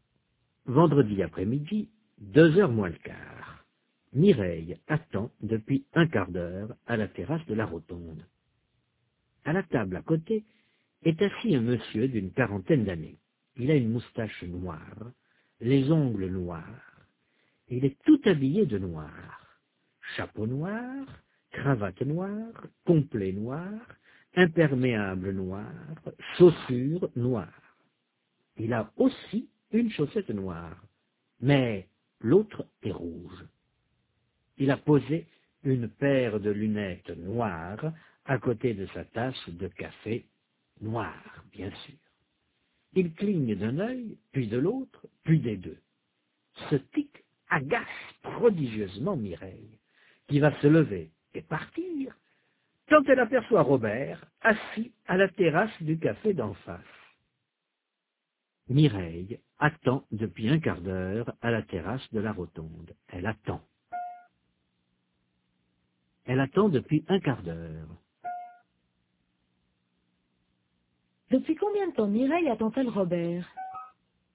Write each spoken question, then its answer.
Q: Depuis combien de temps Mireille attend-elle Robert?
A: Depuis un quart d'heure.